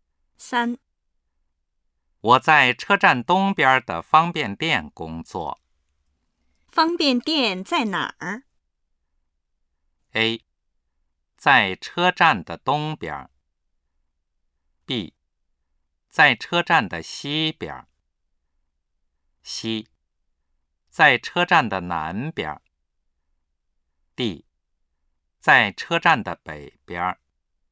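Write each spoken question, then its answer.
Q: 方便店在哪儿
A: A: 在车站的东边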